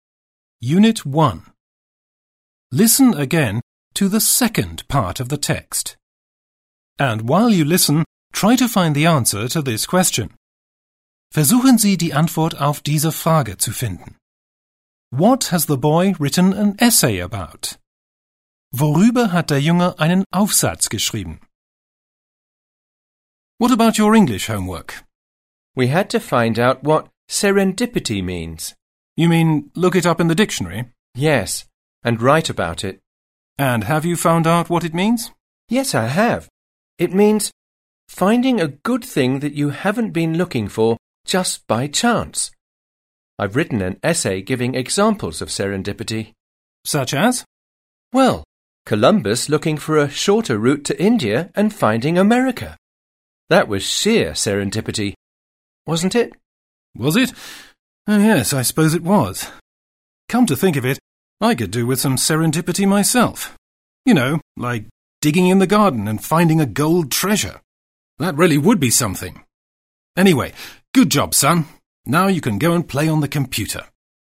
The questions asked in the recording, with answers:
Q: What has the boy written an essay about?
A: The boy has written an essay about serendipity.